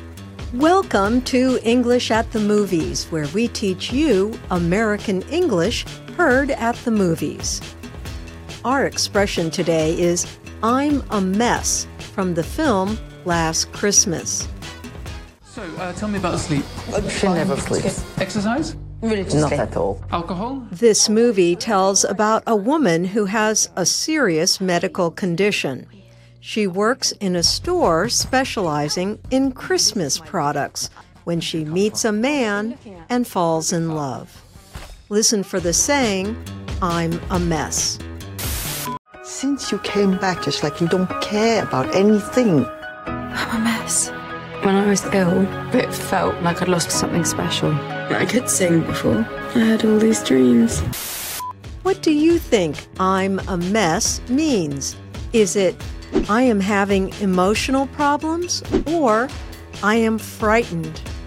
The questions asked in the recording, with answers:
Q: What do you think I'm a mess means?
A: I'm a mess means A, I am having emotional problems.